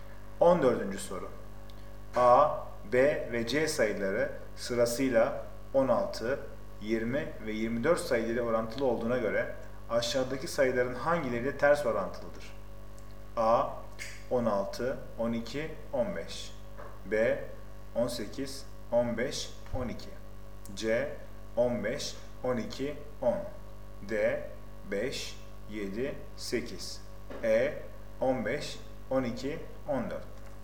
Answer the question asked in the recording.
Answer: Doğru cevap C 15, 12, 10.